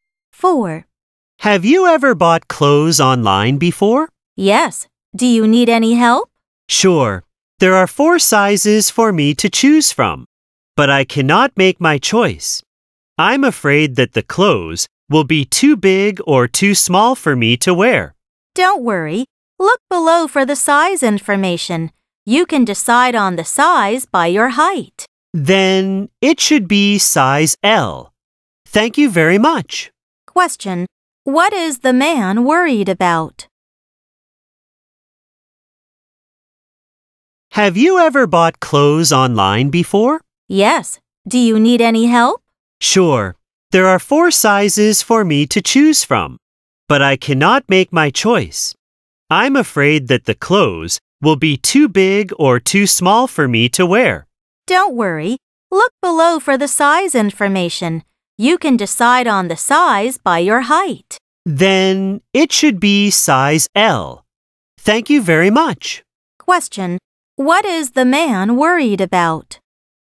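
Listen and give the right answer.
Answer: That the clothes will be too big or too small (the size)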